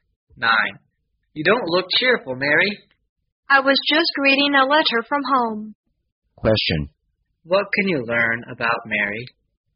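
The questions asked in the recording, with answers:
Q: What can you learn about Mary?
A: She got bad news in a letter from home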